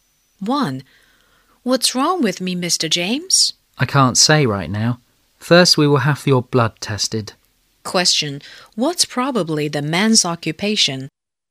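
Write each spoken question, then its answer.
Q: What's probably the man's occupation?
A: A doctor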